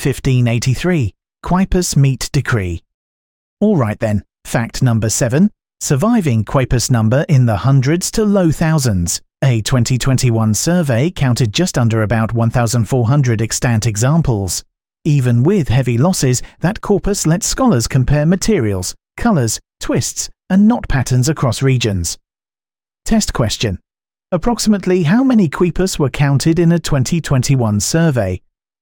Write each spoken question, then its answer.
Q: Approximately how many quipus were counted in a 2021 survey?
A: Correct answer, about 1,400.